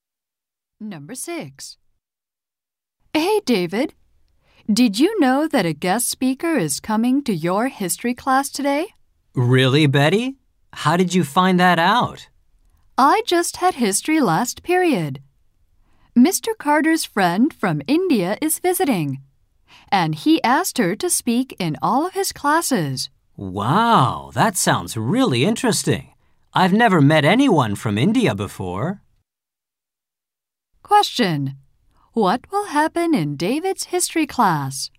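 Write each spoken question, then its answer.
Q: What will happen in David's history class?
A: A guest speaker from India will speak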